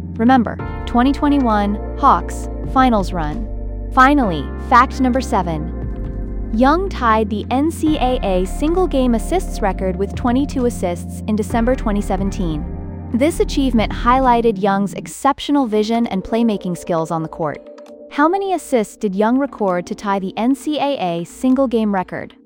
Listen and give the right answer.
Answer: Correct answer, 22 assists.